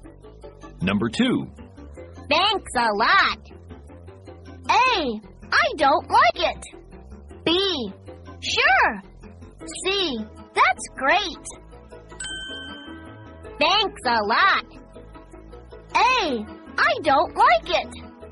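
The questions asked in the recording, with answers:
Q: Thanks a lot.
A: B: Sure.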